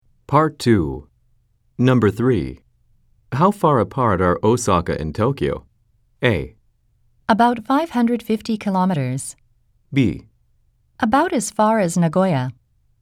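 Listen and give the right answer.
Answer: A: About 550 kilometers.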